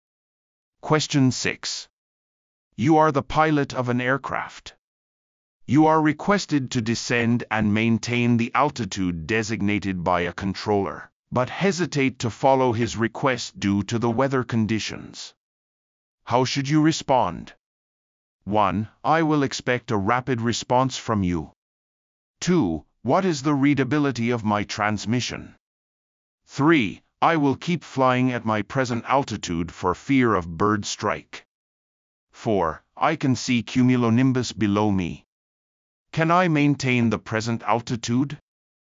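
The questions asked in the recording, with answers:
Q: How should you respond?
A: 4: I can see cumulonimbus below me. Can I maintain the present altitude?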